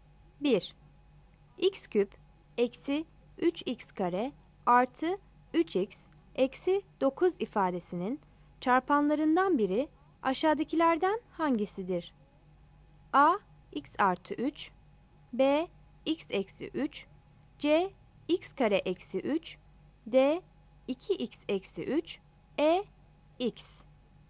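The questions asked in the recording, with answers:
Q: X küp eksi 3x kare artı 3x eksi 9 ifadesinin çarpanlarından biri aşağıdakilerden hangisidir?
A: B: x eksi 3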